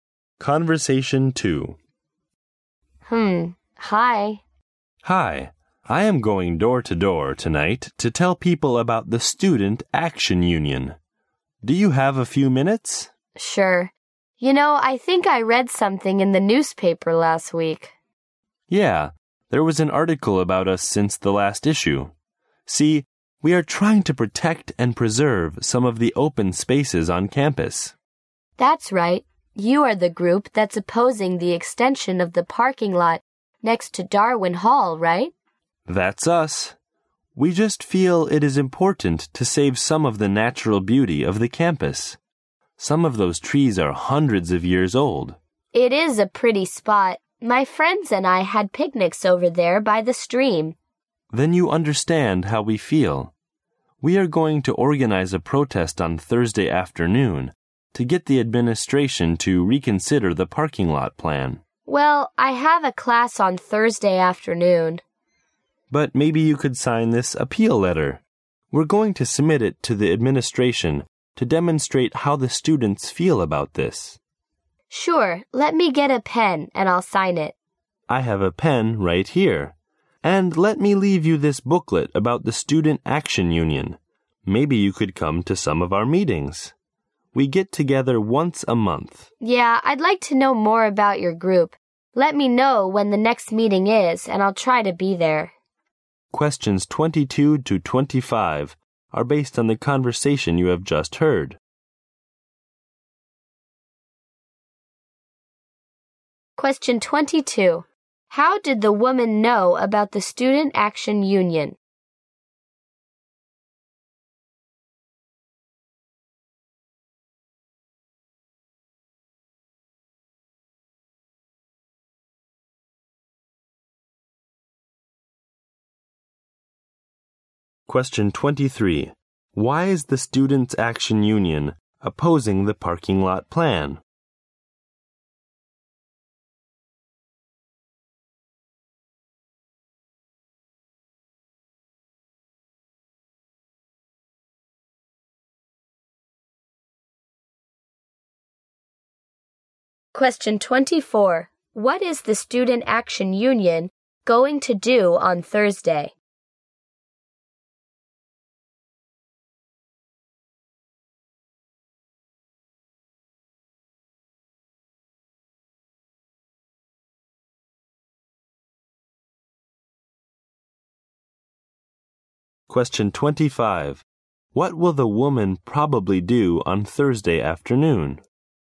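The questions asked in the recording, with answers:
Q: How did the woman know about the Student Action Union?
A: From an article in the newspaper

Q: Why is the Student Action Union opposing the parking lot plan?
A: To save the campus's natural beauty, including trees that are hundreds of years old

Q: What is the Student Action Union going to do on Thursday?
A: Hold a protest against the parking lot plan

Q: What will the woman probably do on Thursday afternoon?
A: Go to her class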